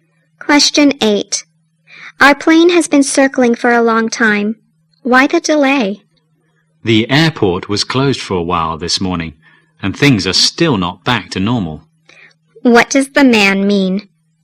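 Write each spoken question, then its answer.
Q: What does the man mean?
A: The airport was closed for a while and things aren't back to normal yet.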